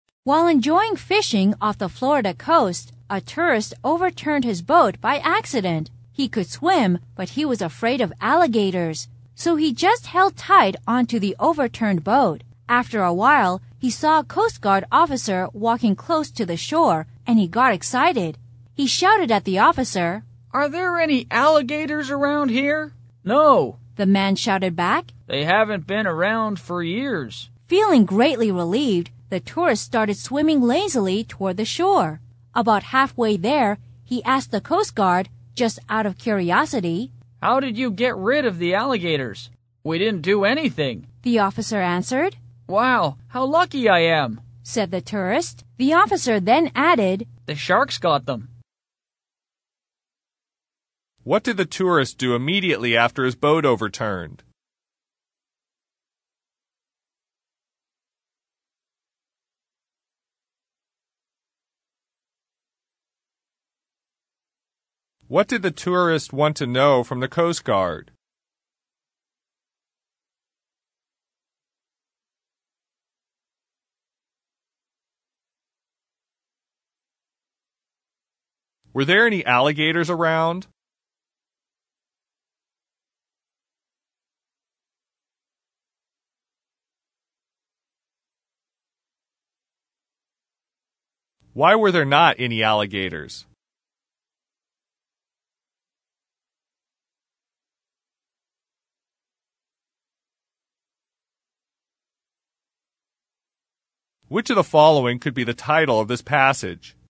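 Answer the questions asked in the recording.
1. He held tight onto the overturned boat.
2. Whether there were any alligators around.
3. No.
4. The sharks got them.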